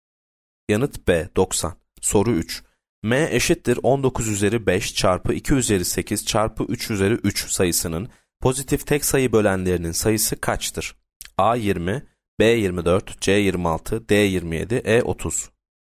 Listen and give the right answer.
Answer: Yanıt B 24.